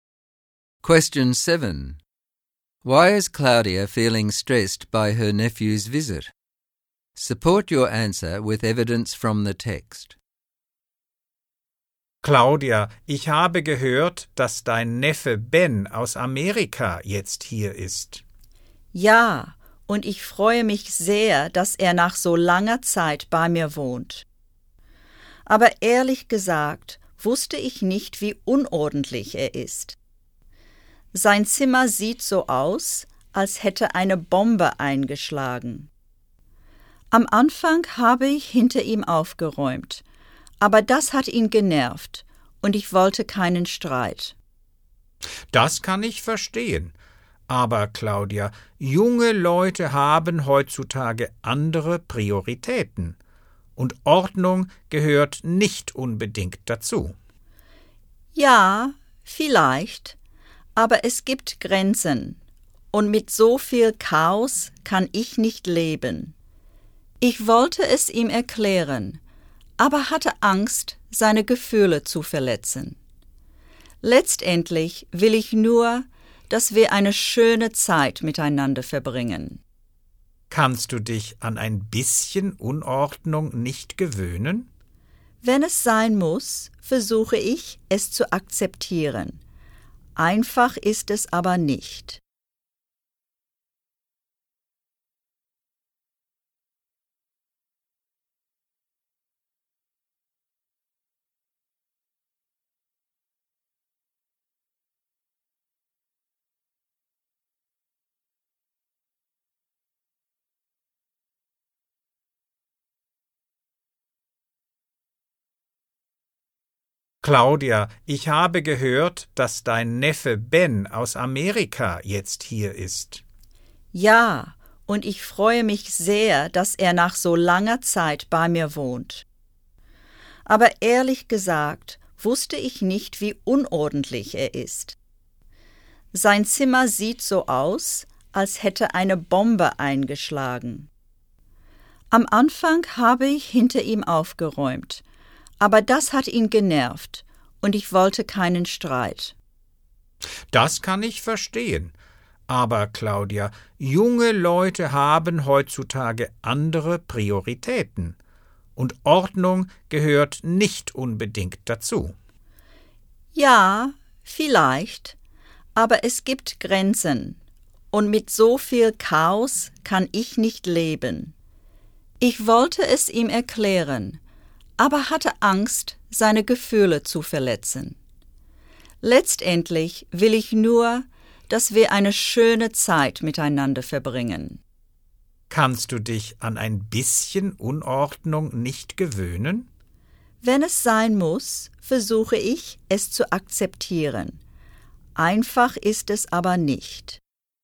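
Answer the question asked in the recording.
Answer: Ben is very untidy (his room looks as if a bomb hit it), and she can't live with so much chaos. Tidying up after him annoyed him, and she wants to avoid an argument and is afraid of hurting his feelings, because she wants them to have a nice time.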